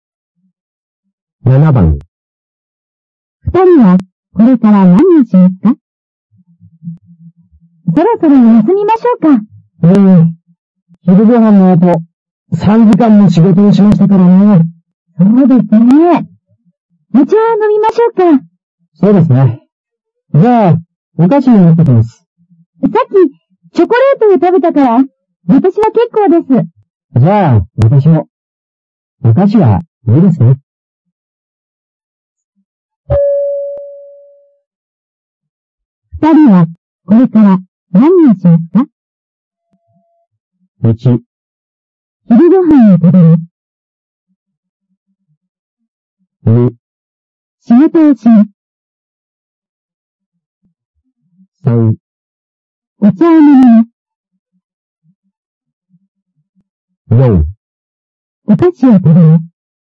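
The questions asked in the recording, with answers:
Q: 二人は、これから、何をしますか?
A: 3: お茶を飲みます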